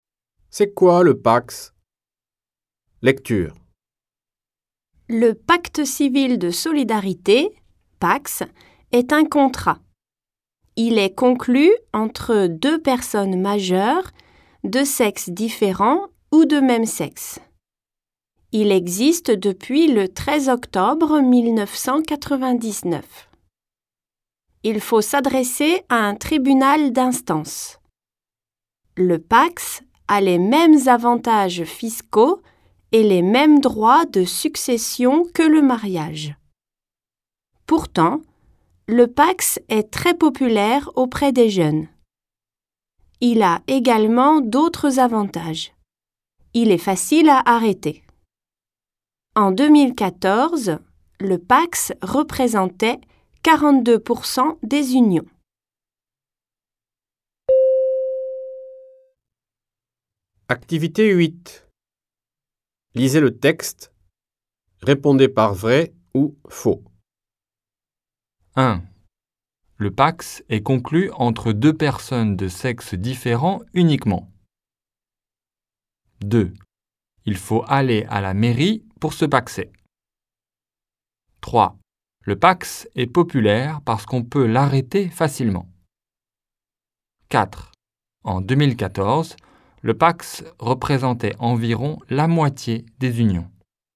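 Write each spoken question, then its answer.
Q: Le Pax est conclu entre deux personnes de sexe différent uniquement.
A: Faux

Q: Il faut aller à la mairie pour se paxer.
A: Faux

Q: Le Pax est populaire parce qu'on peut l'arrêter facilement.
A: Vrai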